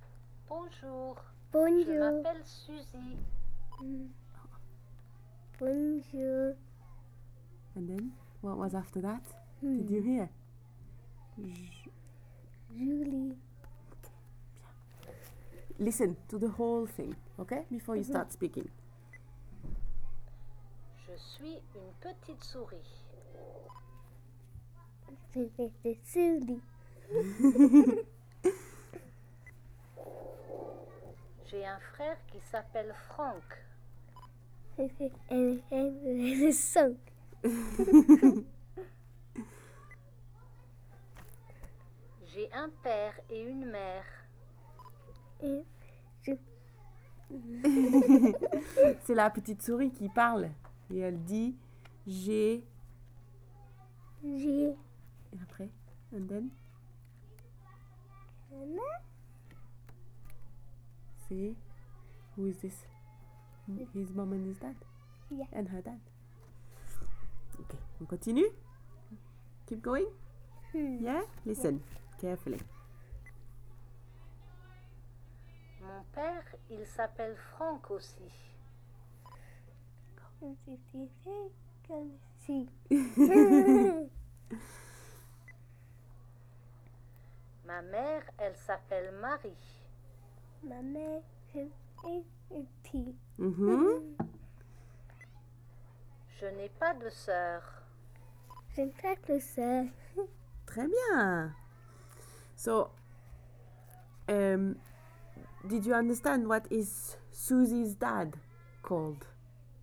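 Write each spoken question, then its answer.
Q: did you understand what is Susie's dad called?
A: Franck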